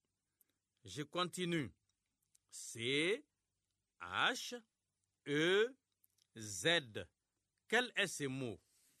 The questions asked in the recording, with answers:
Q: C-H-E-Z. Quel est ce mot?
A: J'espère que vous avez trouvé chez.